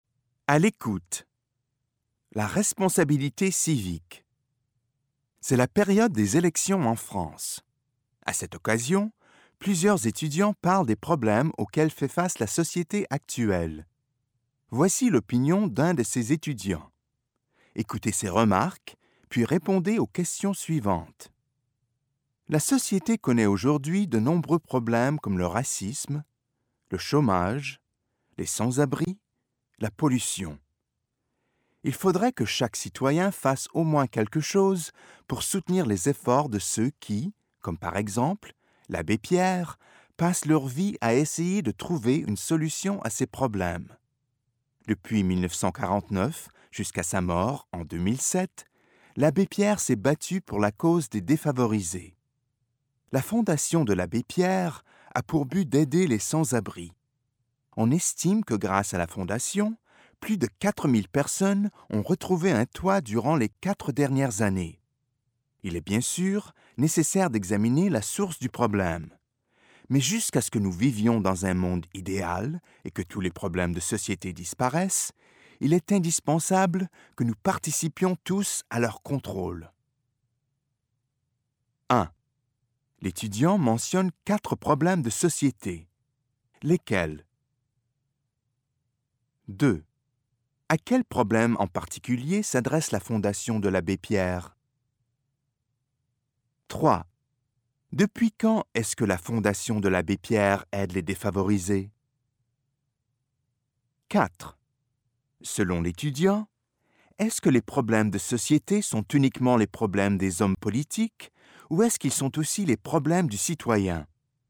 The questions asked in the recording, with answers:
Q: L'étudiant mentionne 4 problèmes de société. Lesquels ?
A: Le racisme, le chômage, les sans-abri, la pollution.

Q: À quel problème en particulier s'adresse la fondation de l'abbé Pierre ?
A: Au problème des sans-abri.

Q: Depuis quand est-ce que la fondation de l'abbé Pierre aide les défavorisés ?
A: Depuis 1949.